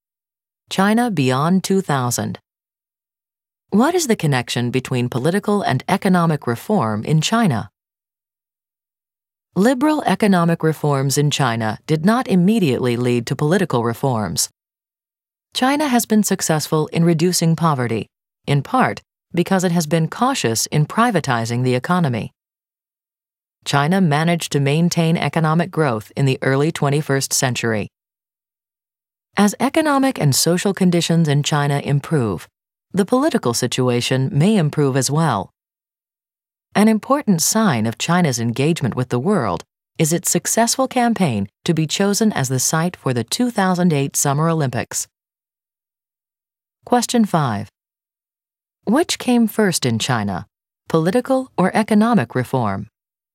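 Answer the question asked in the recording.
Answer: Economic reform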